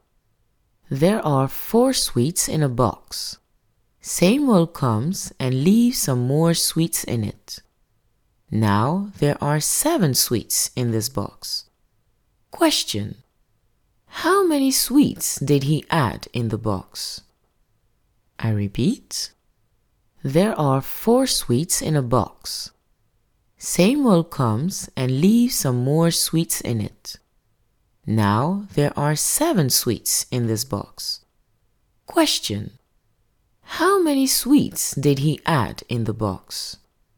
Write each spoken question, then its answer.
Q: How many sweets did he add in the box?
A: Samuel added 3 sweets in the box